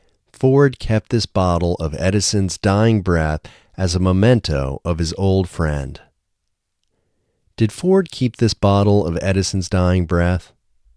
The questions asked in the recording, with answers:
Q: Did Ford keep this bottle of Edison's dying breath?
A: Yes, Ford kept this bottle of Edison's dying breath.